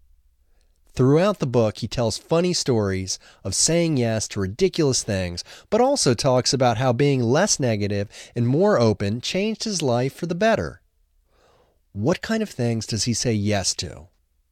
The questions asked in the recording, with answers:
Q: What kind of things does he say yes to?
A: He says yes to ridiculous things.